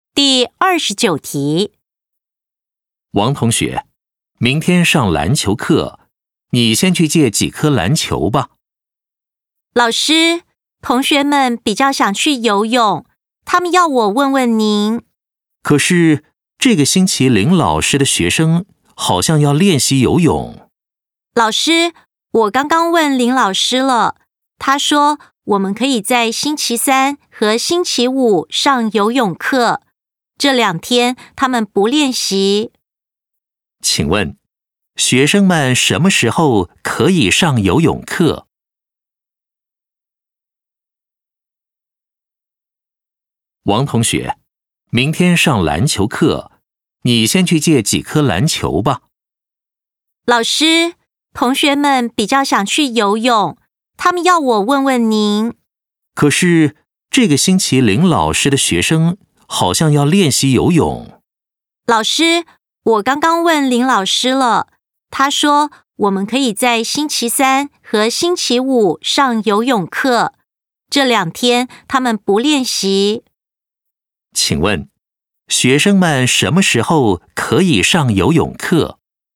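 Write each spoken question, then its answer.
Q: 请问,学生们什么时候可以上游泳课?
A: 星期三和星期五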